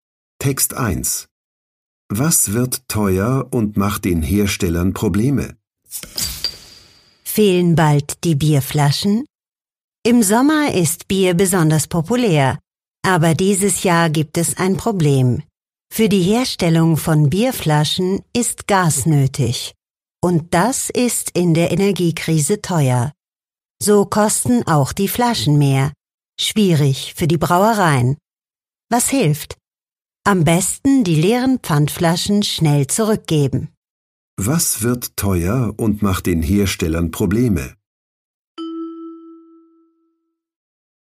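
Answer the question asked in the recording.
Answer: Die Bierflaschen (wegen des teuren Gases)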